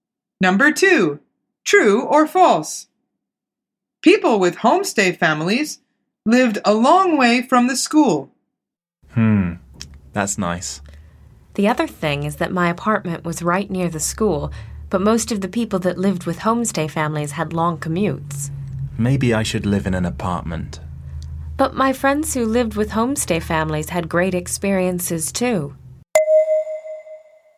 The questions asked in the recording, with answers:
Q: People with homestay families lived a long way from the school.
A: The answer is true. She says, most of the people that lived with homestay families had long commutes.